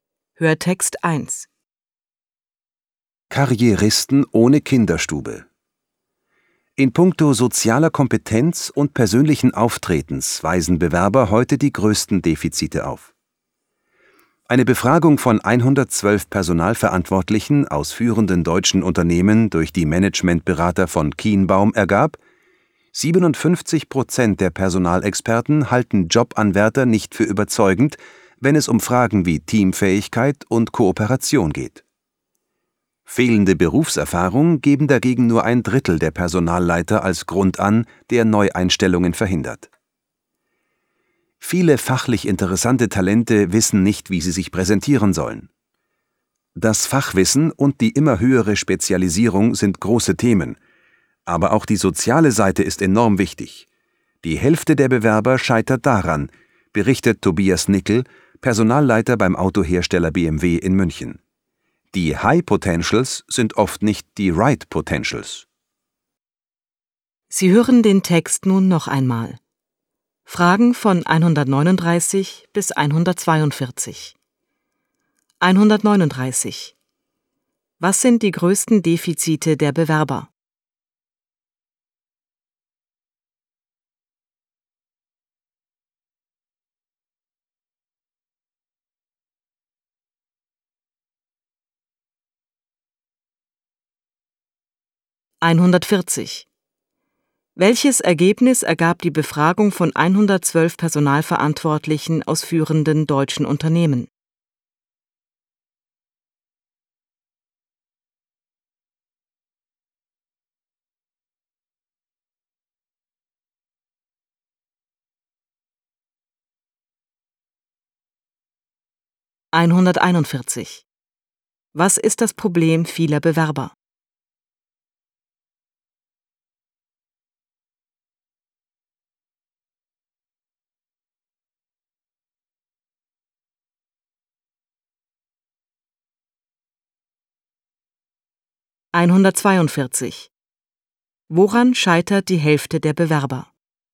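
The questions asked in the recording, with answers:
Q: Was sind die größten Defizite der Bewerber?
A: Soziale Kompetenz und persönliches Auftreten

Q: Welches Ergebnis ergab die Befragung von 112 Personalverantwortlichen aus führenden deutschen Unternehmen?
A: 57% finden Bewerber bei Teamfähigkeit und Kooperation nicht überzeugend

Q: Was ist das Problem vieler Bewerber?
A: Sie wissen nicht, wie sie sich präsentieren sollen

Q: Woran scheitert die Hälfte der Bewerber?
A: An der sozialen Seite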